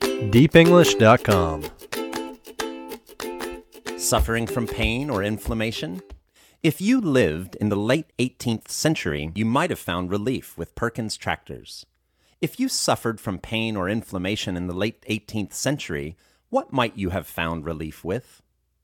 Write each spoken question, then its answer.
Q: If you suffered from pain or inflammation in the late 18th century, what might you have found relief with?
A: If you suffered from pain or inflammation in the late 18th century, you might have found relief with Perkins tractors.